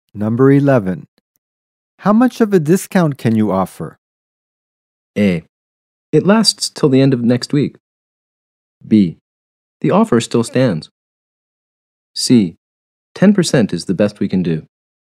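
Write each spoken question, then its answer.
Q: How much of a discount can you offer?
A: C: 10% is the best we can do.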